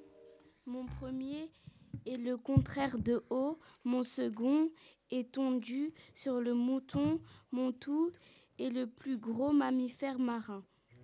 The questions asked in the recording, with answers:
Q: Mon tout est le plus gros mammifère marin.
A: C'est la baleine.